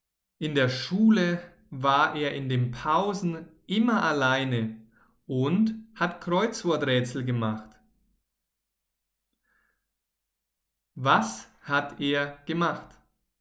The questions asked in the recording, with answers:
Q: Was hat er gemacht?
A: Kreuzworträtsel. Er, also Theo, hat Kreuzworträtsel gemacht.